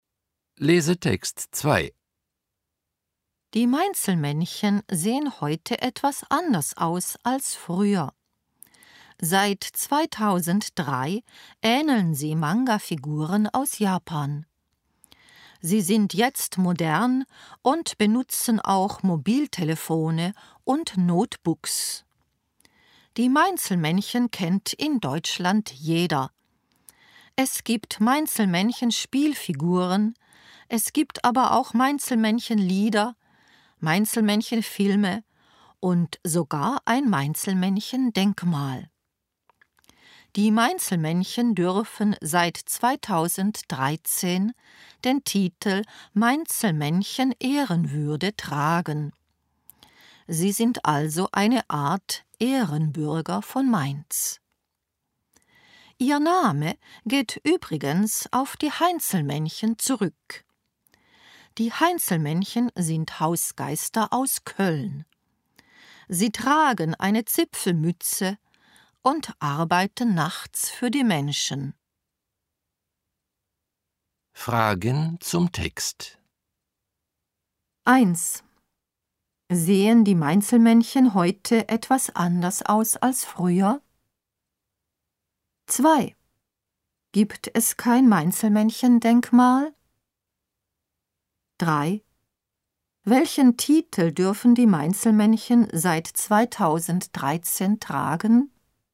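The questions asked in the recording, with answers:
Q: Sehen die Mainzelmännchen heute etwas anders aus als früher?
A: Ja, seit 2003 ähneln sie Manga-Figuren.

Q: Gibt es kein Mainzelmännchen-Denkmal?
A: Doch, es gibt ein Mainzelmännchen-Denkmal.

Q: Welchen Titel dürfen die Mainzelmännchen seit 2013 tragen?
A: Mainzelmännchen Ehrenwürde (eine Art Ehrenbürger von Mainz)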